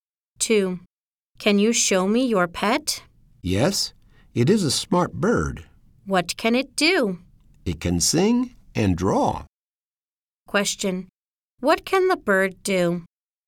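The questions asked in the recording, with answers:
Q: What can the bird do?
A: It can sing and draw.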